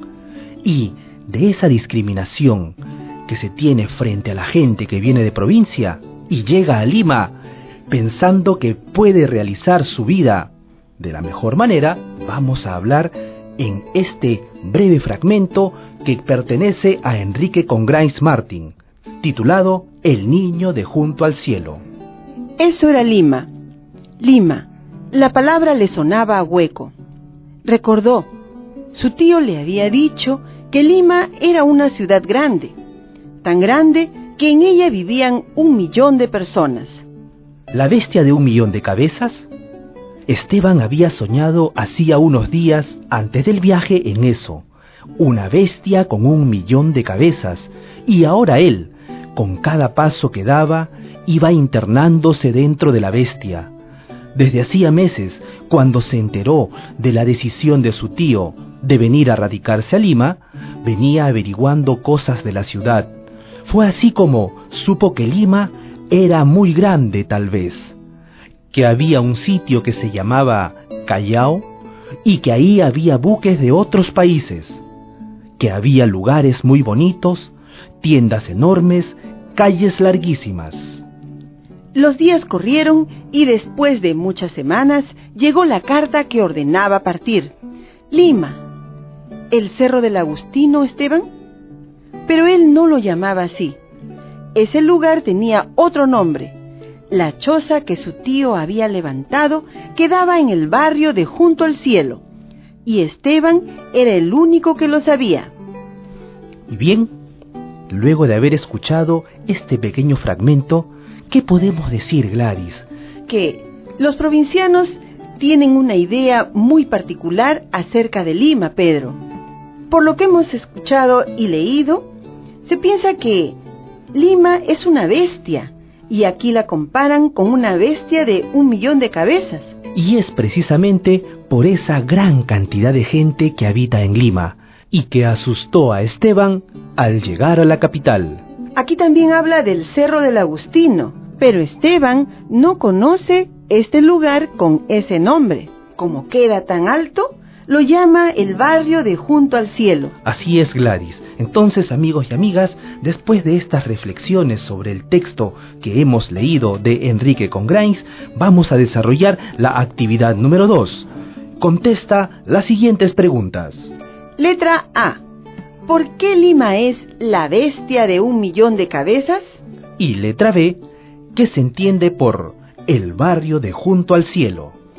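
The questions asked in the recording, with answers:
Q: ¿Por qué Lima es la bestia de 1 millón de cabezas?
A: Por la gran cantidad de gente (un millón de personas) que vive en Lima

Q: ¿Qué se entiende por el barrio de Junto al Cielo?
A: El Cerro El Agustino, donde estaba la choza del tío; lo llama así porque queda muy alto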